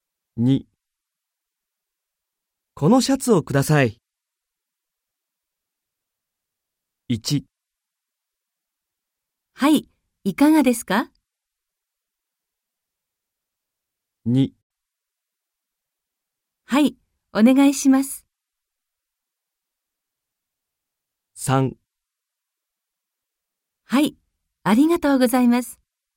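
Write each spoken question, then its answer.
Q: このシャツをください。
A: 3: はい、ありがとうございます。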